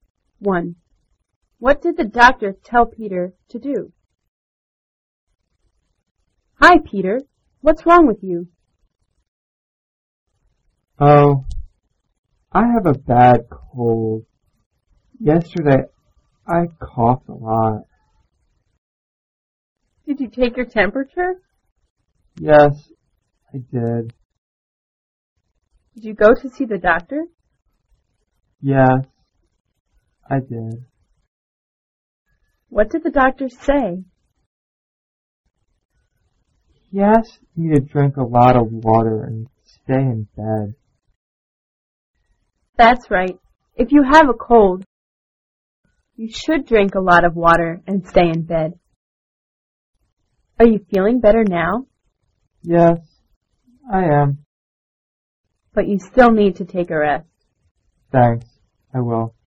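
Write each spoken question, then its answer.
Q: What did the doctor tell Peter to do?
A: Drink a lot of water and stay in bed.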